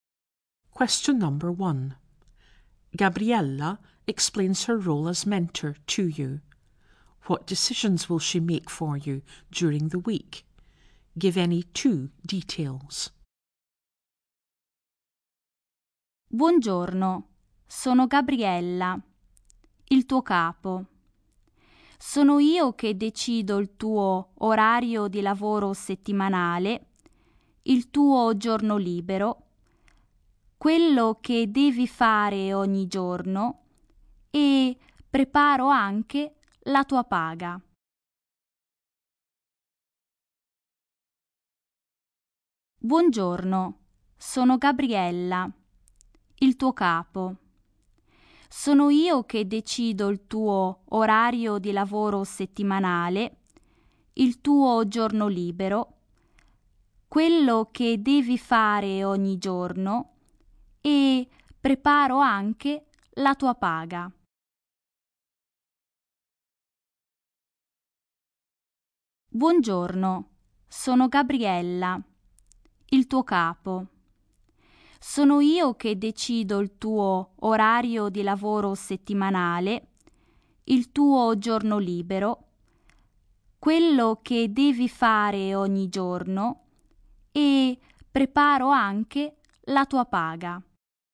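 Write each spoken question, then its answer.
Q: What decisions will she make for you during the week?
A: Any two: your weekly working hours, your day off, what you do each day (she also prepares your pay)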